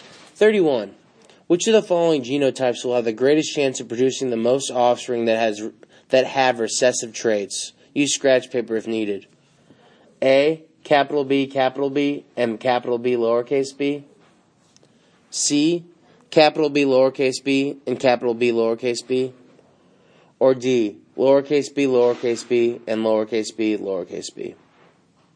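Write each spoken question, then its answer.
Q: Which of the following genotypes will have the greatest chance of producing the most offspring that have recessive traits?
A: D: bb and bb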